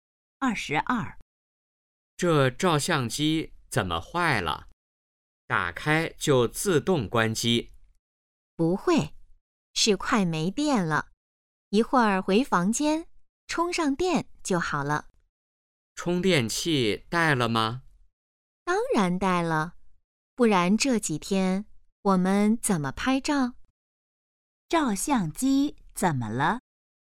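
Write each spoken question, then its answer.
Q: 照相机怎么了?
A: 快没电了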